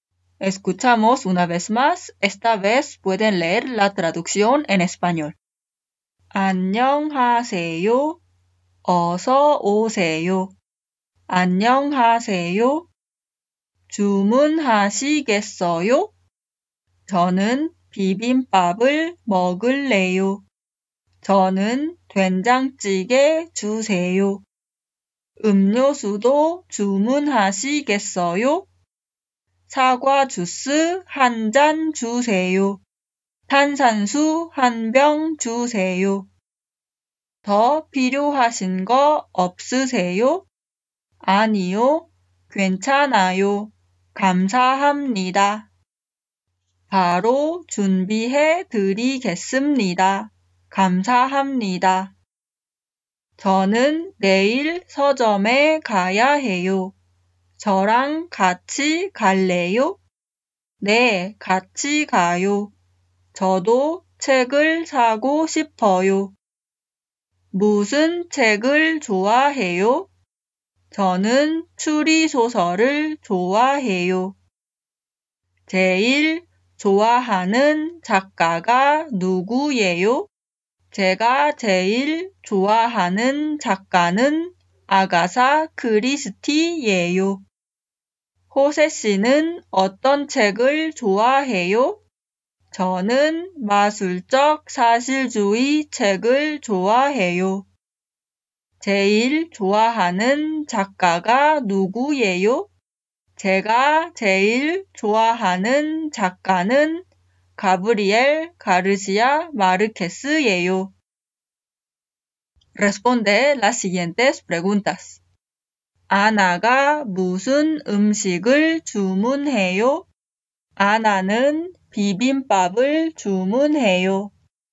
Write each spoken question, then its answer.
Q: 아나가 무슨 음식을 주문해요?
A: 아나는 비빔밥을 주문해요.